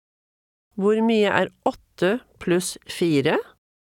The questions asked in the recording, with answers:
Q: Hvor mye 8 pluss 4?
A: 12.